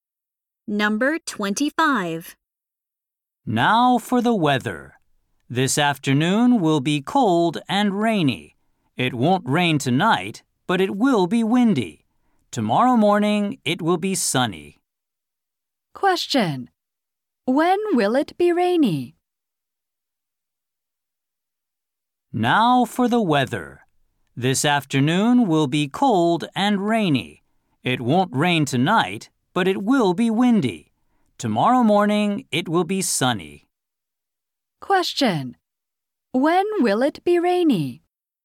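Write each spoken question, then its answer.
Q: When will it be rainy?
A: This afternoon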